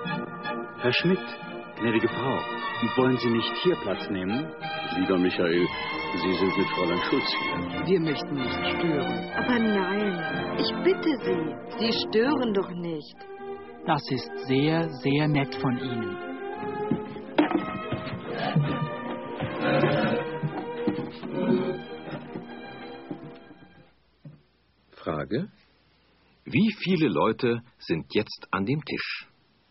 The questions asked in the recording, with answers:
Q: Wie viele Leute sind jetzt an dem Tisch?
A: Jetzt sind 6 Leute an dem Tisch.